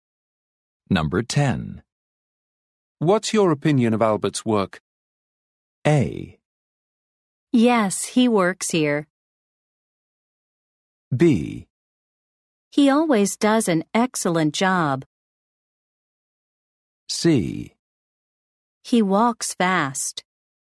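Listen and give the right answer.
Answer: B: He always does an excellent job.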